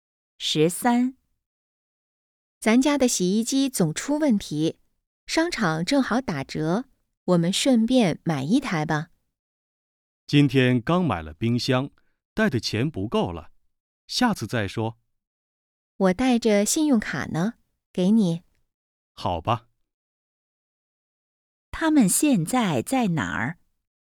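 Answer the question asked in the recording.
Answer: 商场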